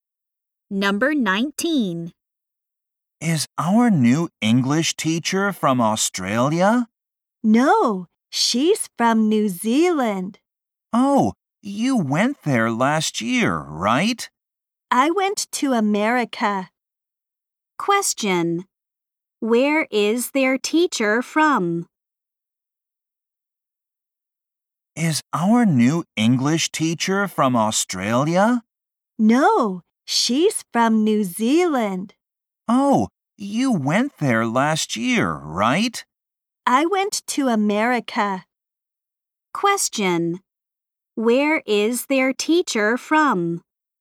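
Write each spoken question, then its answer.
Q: Where is their teacher from?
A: New Zealand.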